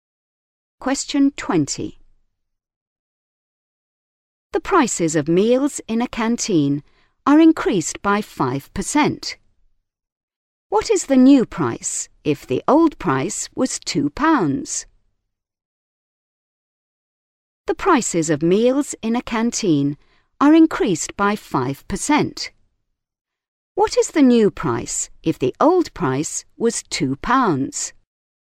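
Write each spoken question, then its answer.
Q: What is the new price if the old price was £2?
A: £2.10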